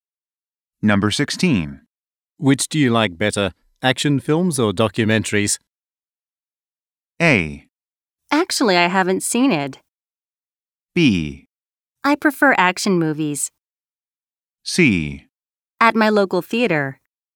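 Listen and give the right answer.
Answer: B: I prefer action movies.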